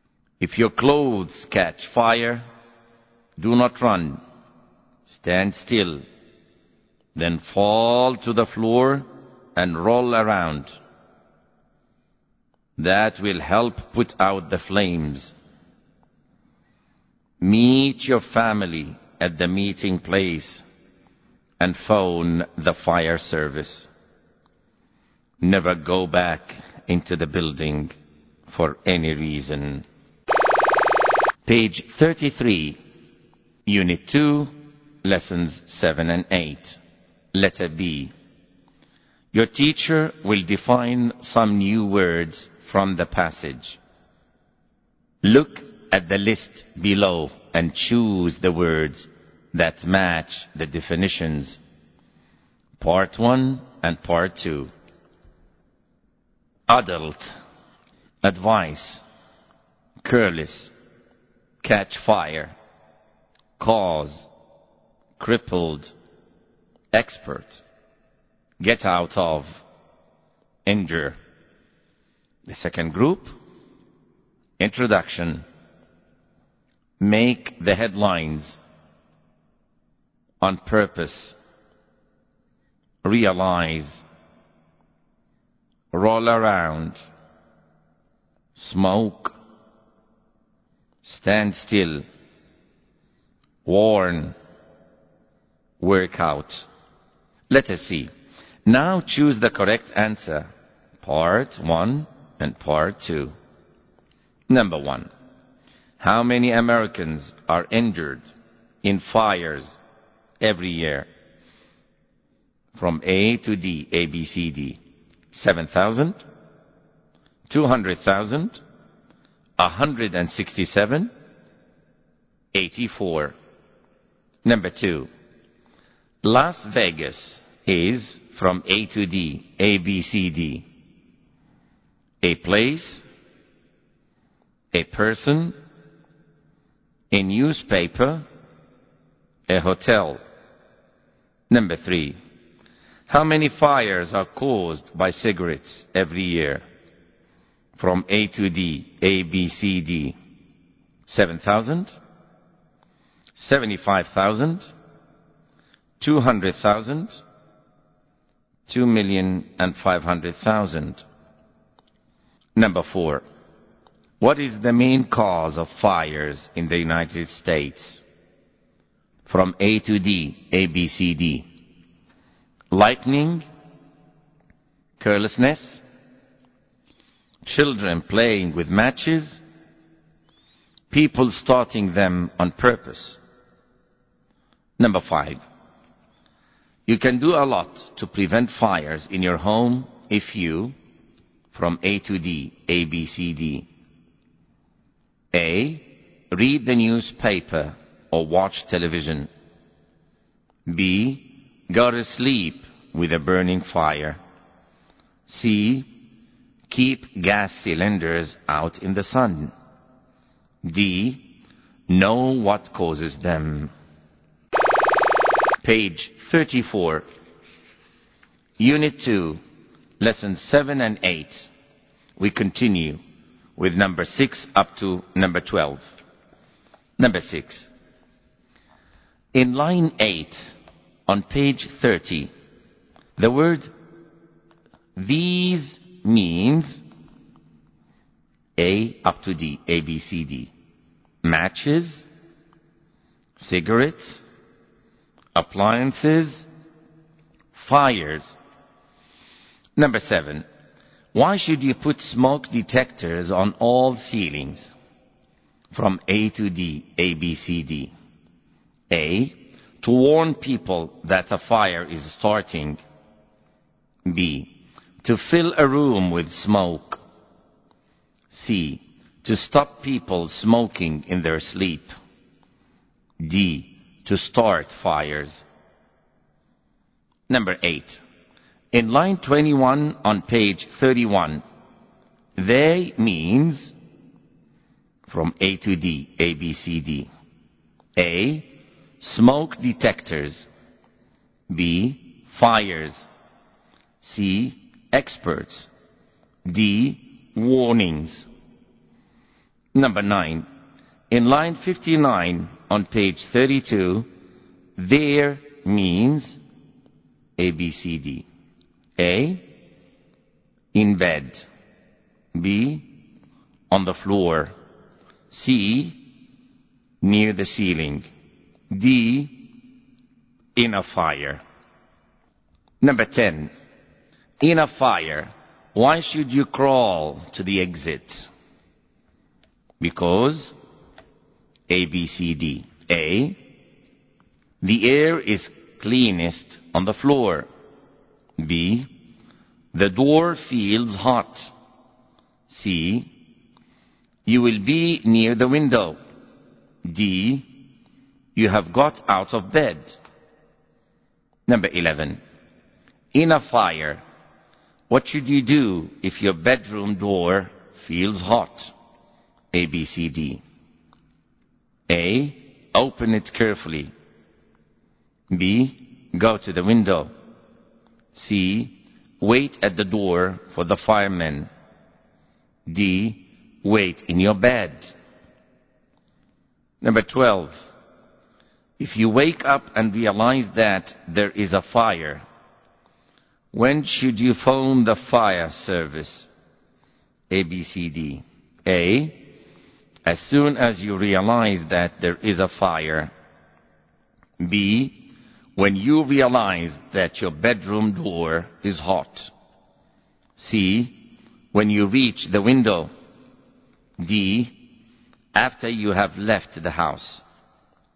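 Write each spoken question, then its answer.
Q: If you wake up and realize that there is a fire, when should you phone the fire service?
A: D: after you have left the house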